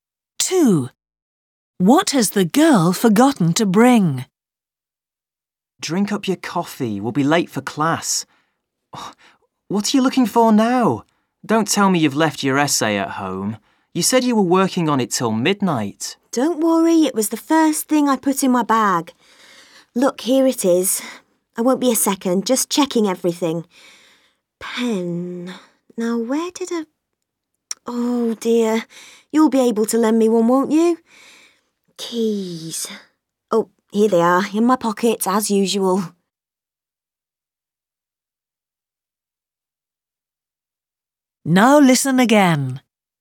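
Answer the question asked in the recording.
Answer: A pen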